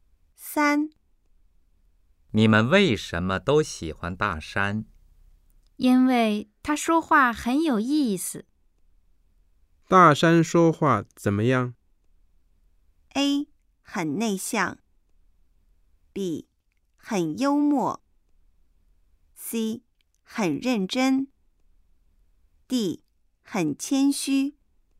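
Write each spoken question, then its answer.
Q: 大山说话怎么样?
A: B: 很幽默。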